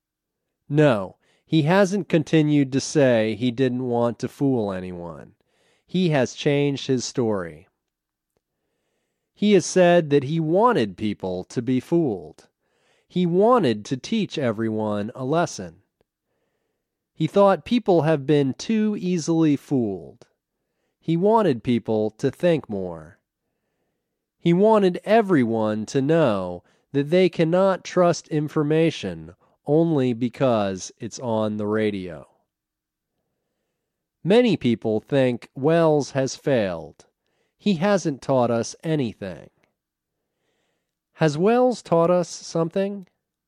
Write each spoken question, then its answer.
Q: Has Welles taught us something?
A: No, he hasn't taught us something.